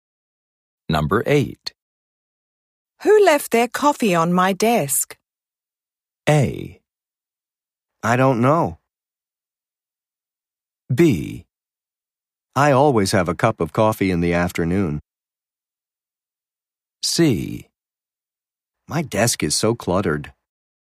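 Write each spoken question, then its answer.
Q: Who left their coffee on my desk?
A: A: I don't know.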